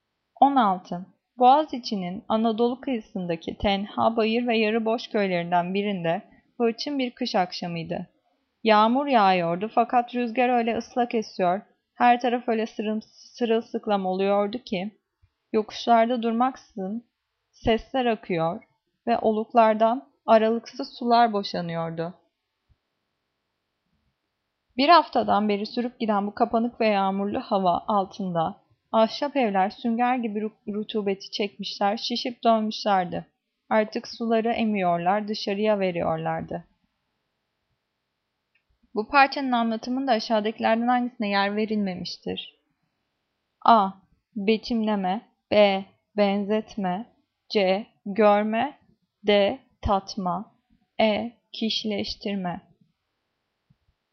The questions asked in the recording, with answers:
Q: Bu parçanın anlatımında aşağıdakilerden hangisine yer verilmemiştir?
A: Cevap D. Tatma.